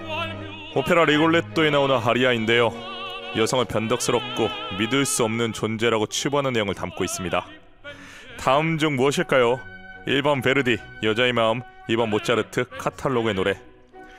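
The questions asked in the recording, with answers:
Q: 다음 중 무엇일까요? 1번 베르디, 여자의 마음, 2번 모차르트, 카탈로그의 노래.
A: 1: 베르디, 여자의 마음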